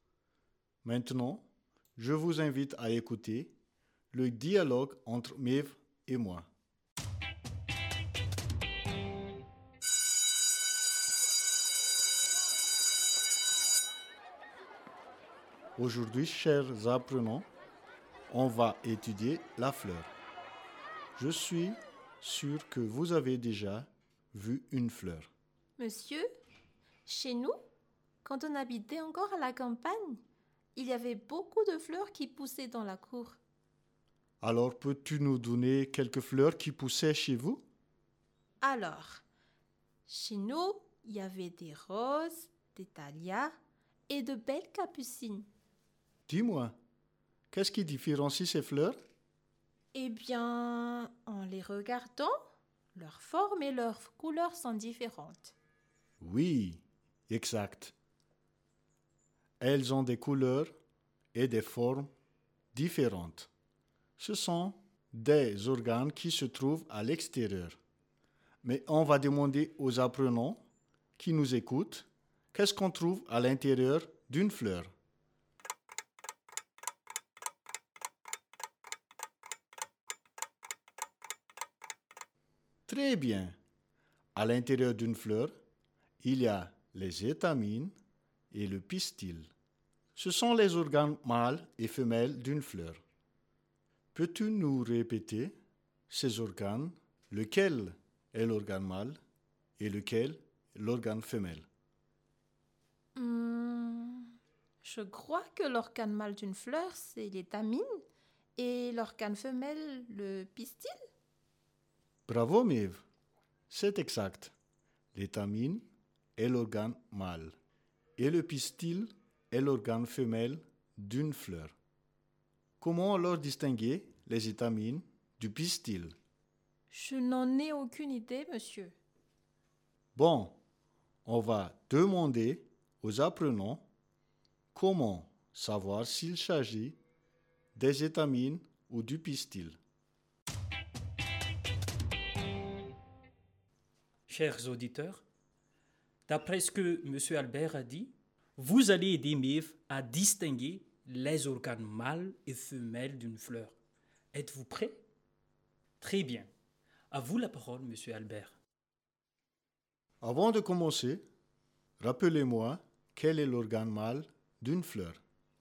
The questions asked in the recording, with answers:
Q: Avant de commencer, rappelez-moi quel est l'organe mâle d'une fleur.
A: L'organe mâle d'une fleur est l'étamine.